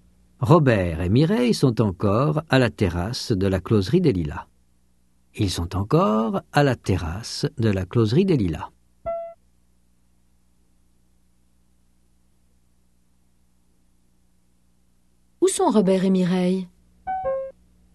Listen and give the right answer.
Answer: À la terrasse de la closerie des Lilas.